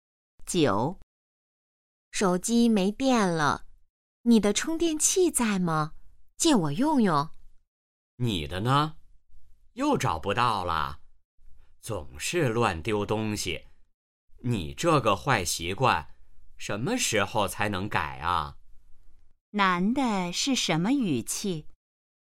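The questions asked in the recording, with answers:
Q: 男的是什么语气?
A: 责备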